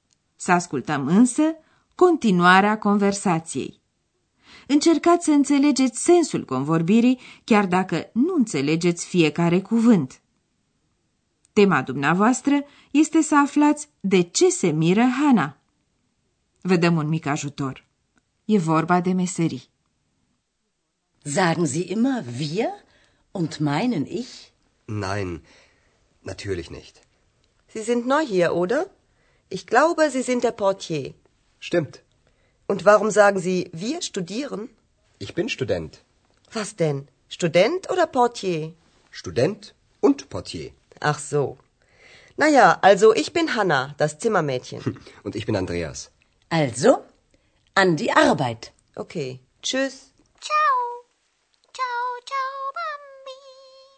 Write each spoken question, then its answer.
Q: Tema dumneavoastră este să aflați de ce se miră Hana.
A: Hanna se miră de faptul că Andreea spune că e student deși mai înainte a admis că e portar.